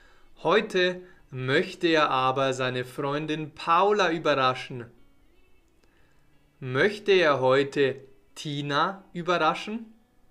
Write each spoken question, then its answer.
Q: Möchte er heute Tina überraschen?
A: Nein, er möchte heute nicht Tina überraschen, sondern er möchte möchte heute Paula überraschen?